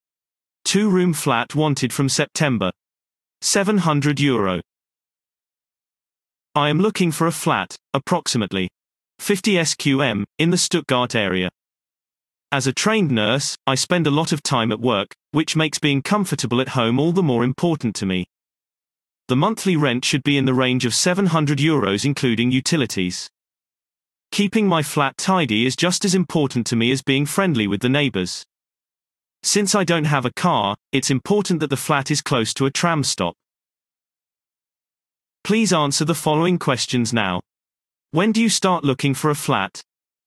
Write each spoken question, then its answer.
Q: When do you start looking for a flat?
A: Response. The flat is wanted from September.